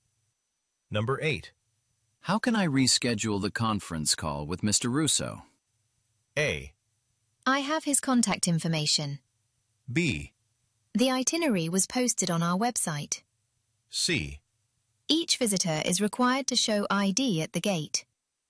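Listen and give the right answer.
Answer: A: I have his contact information.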